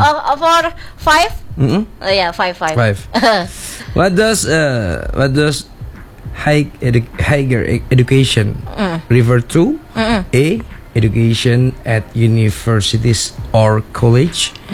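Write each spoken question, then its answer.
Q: What does higher education refer to?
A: A: Education at universities or college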